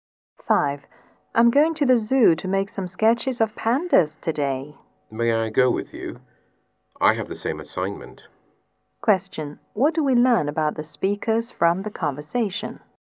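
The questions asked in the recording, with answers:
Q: What do we learn about the speakers from the conversation?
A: They have the same assignment (to sketch pandas)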